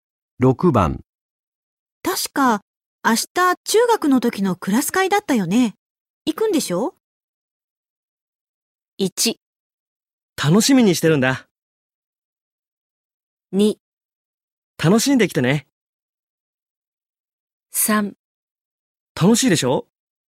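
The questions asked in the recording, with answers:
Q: 確か明日中学の時のクラス会だったよね。行くんでしょ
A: 1: 楽しみにしてるんだ。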